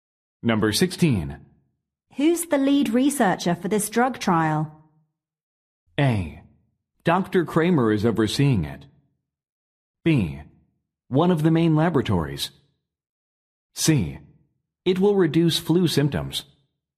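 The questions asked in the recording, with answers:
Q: Who's the lead researcher for this drug trial?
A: A: Dr. Kramer is overseeing it.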